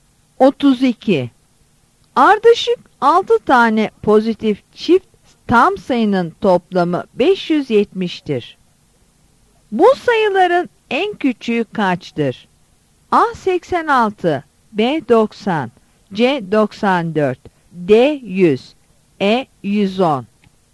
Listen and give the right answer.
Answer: Yanıt B'dir.